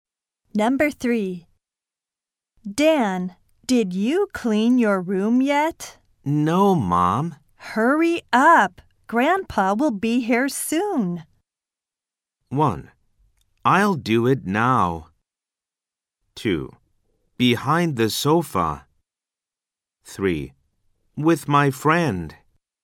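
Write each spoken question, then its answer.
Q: Hurry up. Grandpa will be here soon.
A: 1: I'll do it now.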